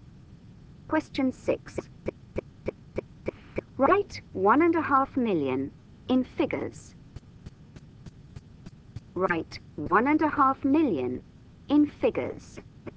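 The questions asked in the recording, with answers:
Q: Write 1.5 million in figures.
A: 1500000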